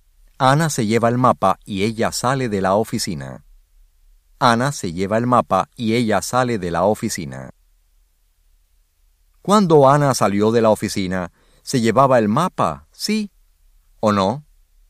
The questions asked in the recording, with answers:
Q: Cuando Ana salió de la oficina, ¿se llevaba el mapa, sí o no?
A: Sí.